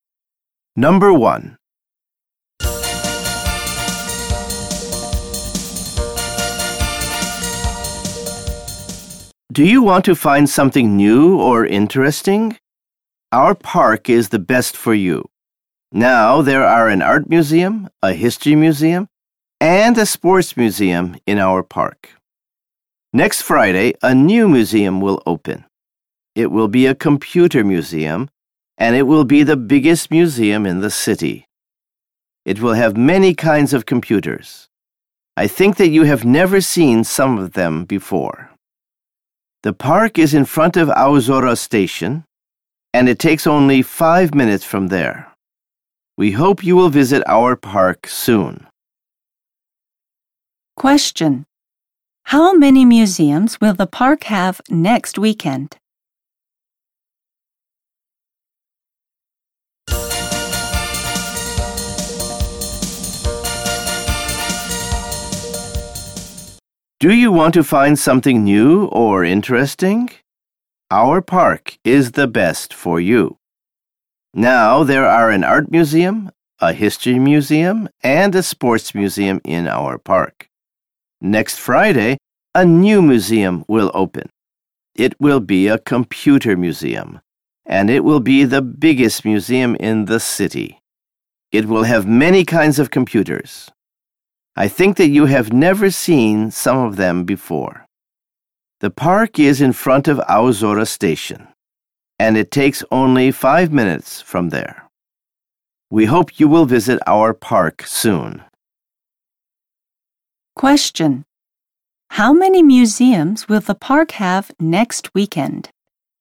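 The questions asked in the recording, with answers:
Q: How many museums will the park have next weekend?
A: Four.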